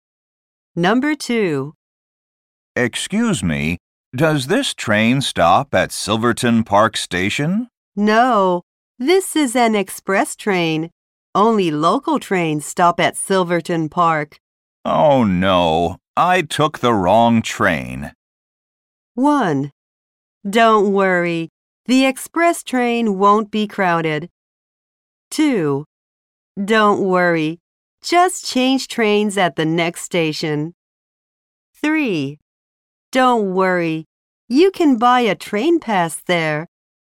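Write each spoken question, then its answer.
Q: Oh no, I took the wrong train.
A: 2: Don't worry, just change trains at the next station.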